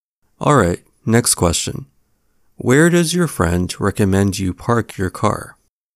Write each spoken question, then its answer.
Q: Where does your friend recommend you park your car?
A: Your friend tells you to park at the grocery store across the street.